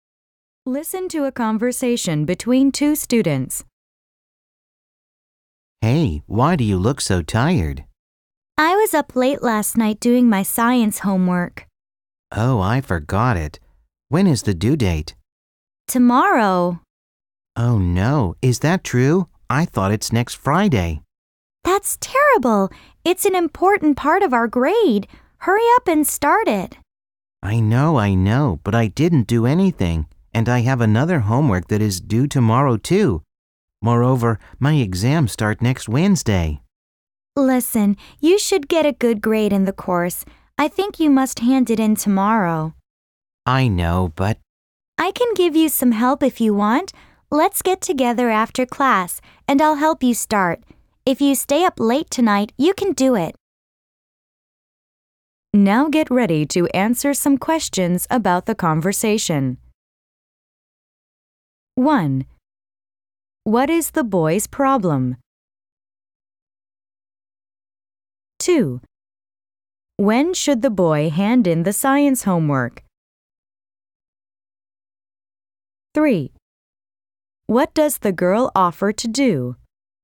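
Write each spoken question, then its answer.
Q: What is the boy's problem?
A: He forgot his science homework, which is due tomorrow

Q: When should the boy hand in the science homework?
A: Tomorrow

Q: What does the girl offer to do?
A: Help him get started on the homework after class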